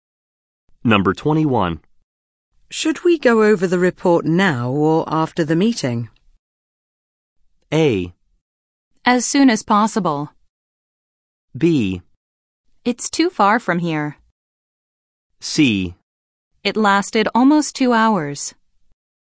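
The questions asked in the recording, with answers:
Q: Should we go over the report now or after the meeting?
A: A: As soon as possible.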